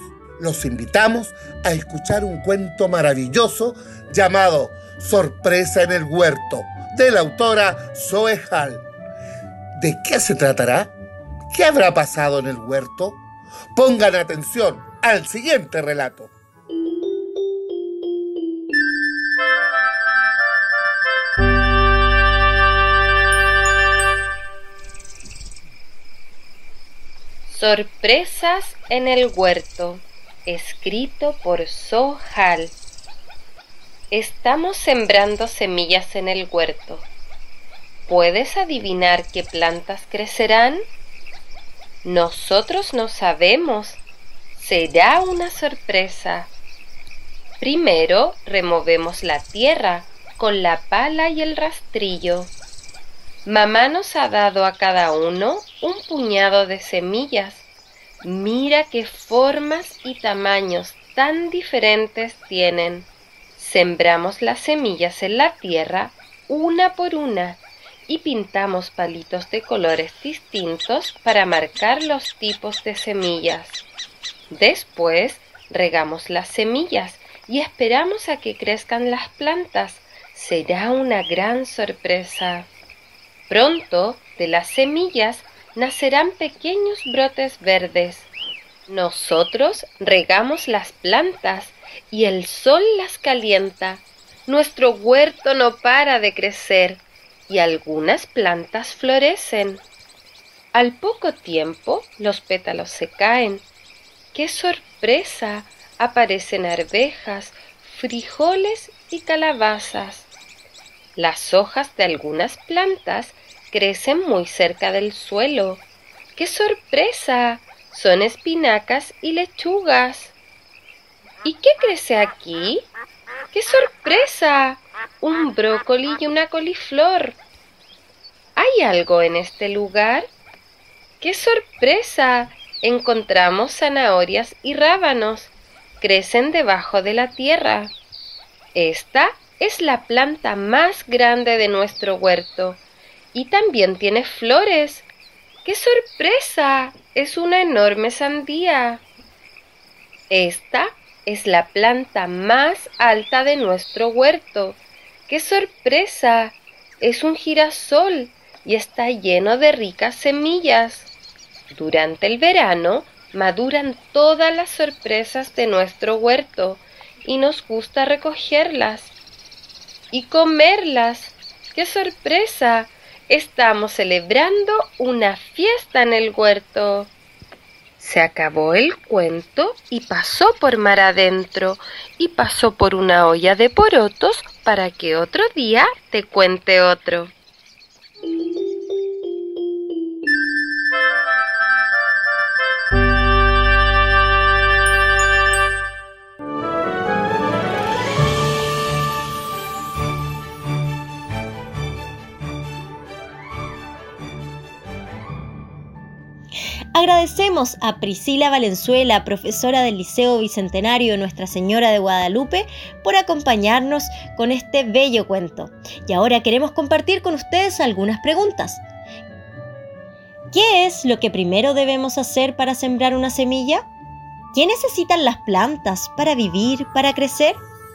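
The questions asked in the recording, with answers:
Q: ¿Qué es lo que primero debemos hacer para sembrar una semilla?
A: Remover la tierra con la pala y el rastrillo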